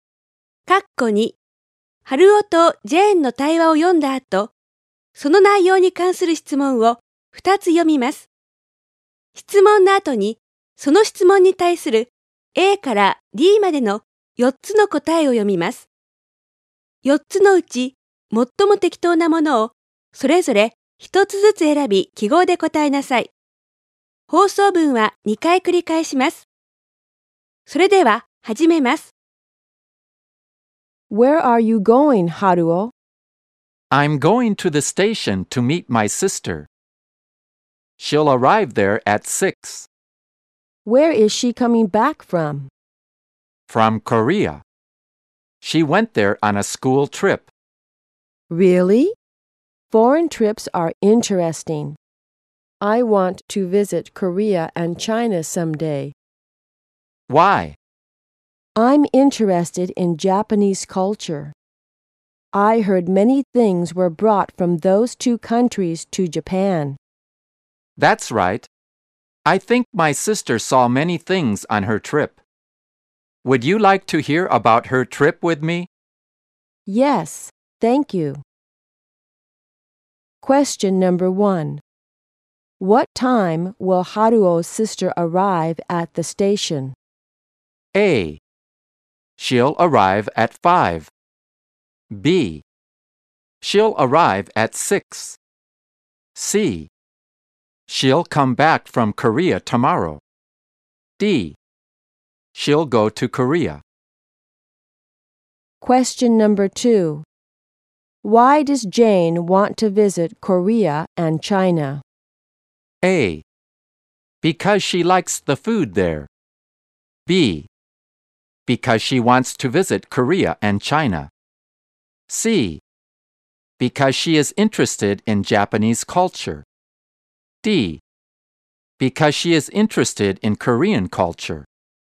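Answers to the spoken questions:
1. B: She'll arrive at 6.
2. C: Because she is interested in Japanese culture.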